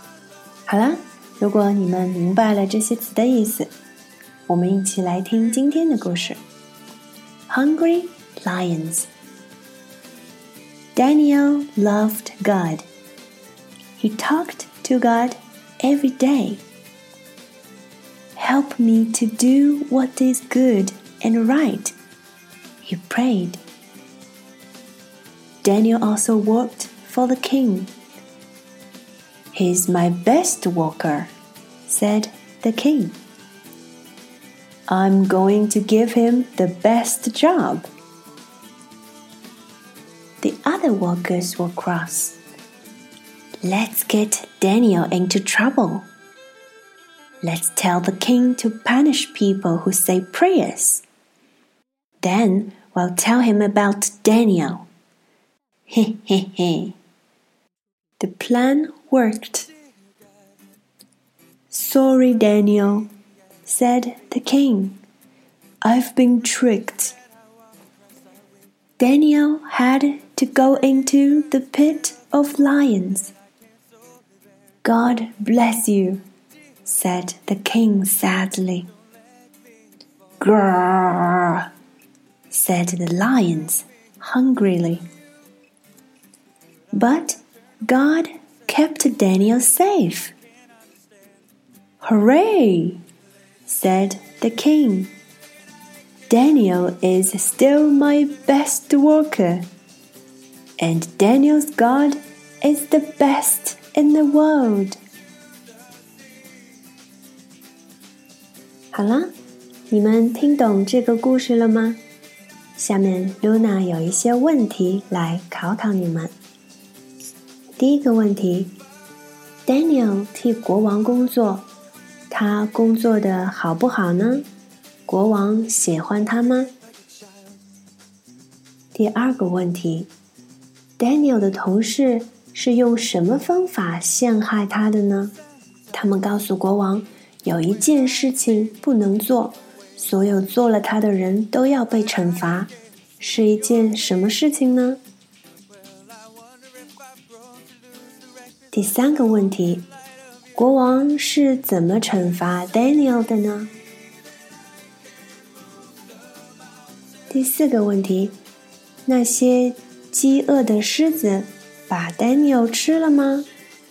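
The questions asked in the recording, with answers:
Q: Daniel 替国王工作,他工作的好不好呢?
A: 很好,他是国王最好的工人

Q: 国王喜欢他吗?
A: 喜欢

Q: 他们告诉国王有一件事情不能做,所有做了他的人都要被惩罚,是一件什么事情呢?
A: 祈祷

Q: 国王是怎么惩罚 Daniel 的呢?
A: 把他扔进狮子的洞穴里

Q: 那些饥饿的狮子把 Daniel 吃了吗?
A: 没有,上帝保护了他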